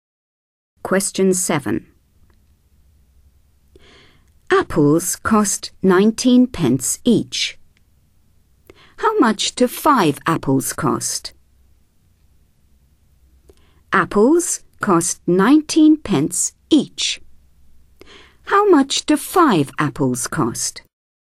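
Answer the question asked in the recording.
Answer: 95 pence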